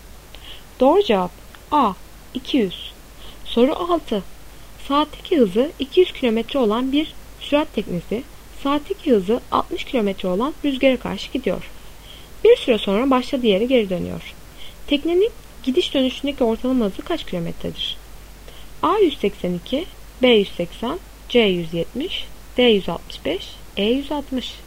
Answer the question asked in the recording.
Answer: Doğru cevap A 182.